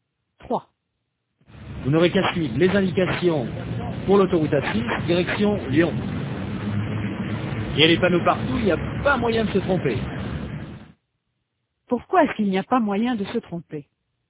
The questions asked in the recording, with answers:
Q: Pourquoi est-ce qu'il n'y a pas moyen de se tromper?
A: Parce qu'il y a des panneaux partout.